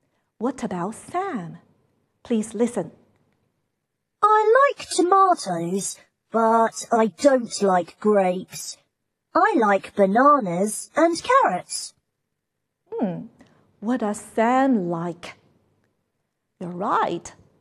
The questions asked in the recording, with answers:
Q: What does Sam like?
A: He likes tomatoes, bananas, and carrots.